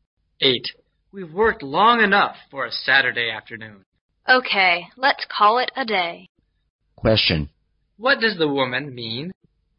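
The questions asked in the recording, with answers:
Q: What does the woman mean?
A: They should stop working for the day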